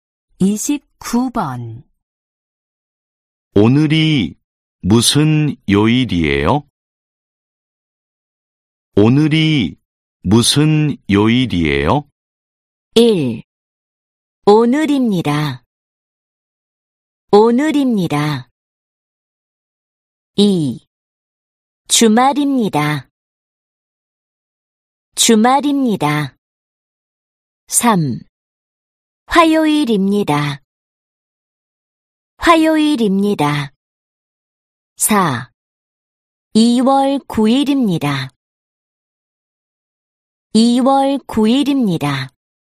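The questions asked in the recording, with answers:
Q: 오늘이 무슨 요일이에요?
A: 3: 화요일입니다.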